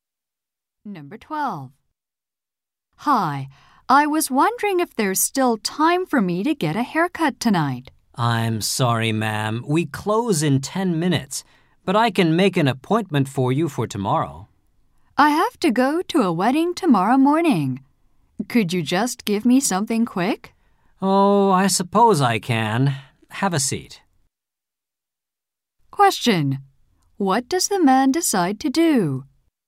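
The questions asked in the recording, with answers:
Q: What does the man decide to do?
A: Give the woman a quick haircut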